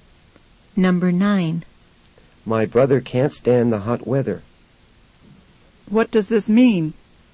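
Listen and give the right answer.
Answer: He dislikes the hot weather very much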